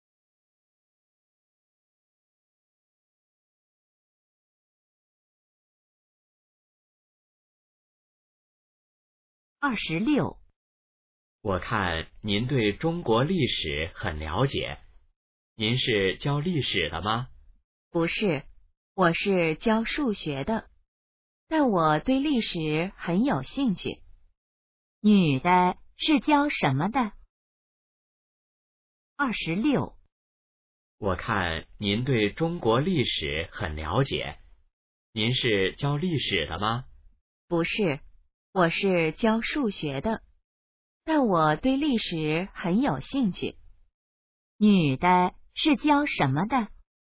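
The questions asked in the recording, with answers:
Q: 女的是教什么的?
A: 数学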